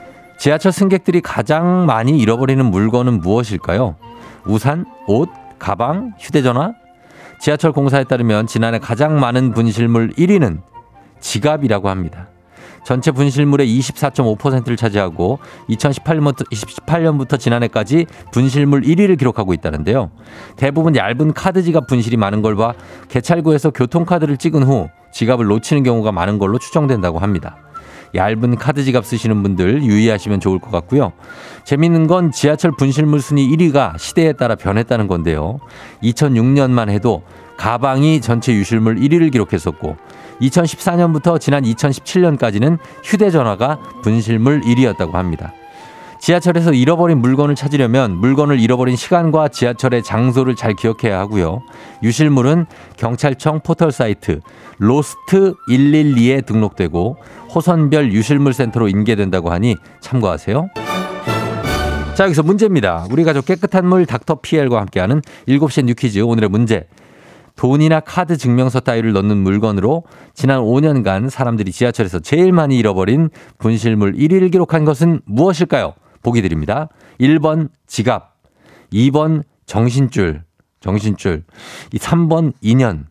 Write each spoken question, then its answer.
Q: 돈이나 카드 증명서 따위를 넣는 물건으로 지난 5년간 사람들이 지하철에서 제일 많이 잃어버린 분실물 1위를 기록한 것은 무엇일까요?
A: 지난해 지하철 분실물 1위는 정답 1번 지갑입니다.